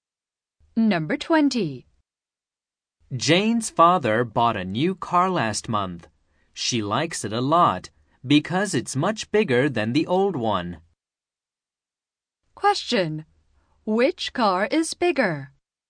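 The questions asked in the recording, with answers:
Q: Which car is bigger?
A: The new car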